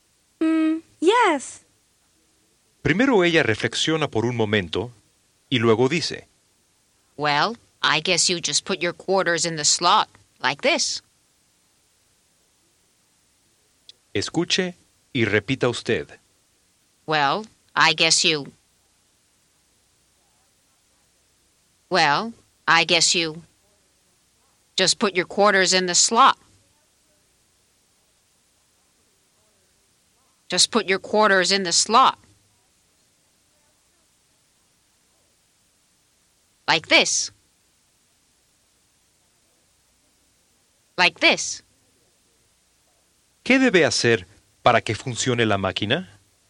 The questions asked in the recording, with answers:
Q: ¿Qué debe hacer para que funcione la máquina?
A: Well, I guess you just put your quarters in the slot, like this.